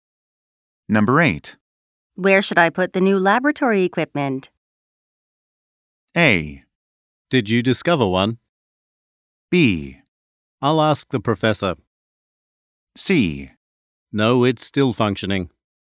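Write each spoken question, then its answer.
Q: Where should I put the new laboratory equipment?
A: B: I'll ask the professor.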